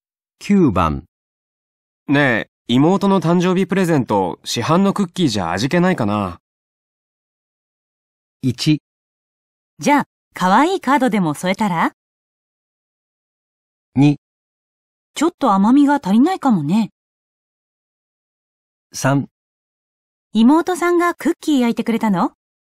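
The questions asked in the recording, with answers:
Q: ねえ、妹の誕生日プレゼント、市販のクッキーじゃ味気ないかな。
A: 1: じゃあ、可愛いカードでも添えたら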